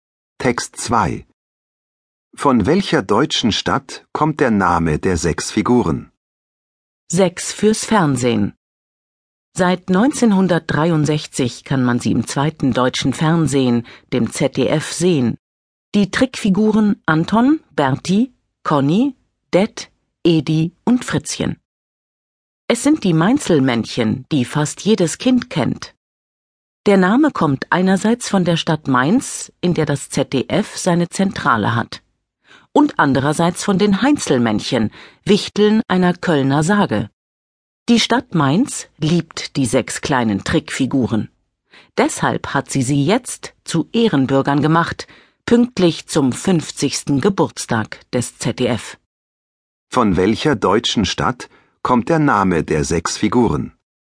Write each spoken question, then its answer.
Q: Von welcher deutschen Stadt kommt der Name der sechs Figuren?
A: Von der Stadt Mainz.